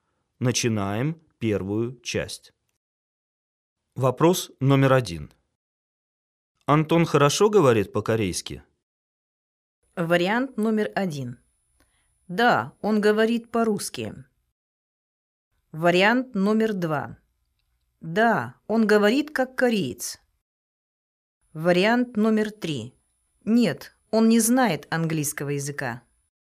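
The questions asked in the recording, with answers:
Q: Антон хорошо говорит по-корейски?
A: 2: Да, он говорит как кореец.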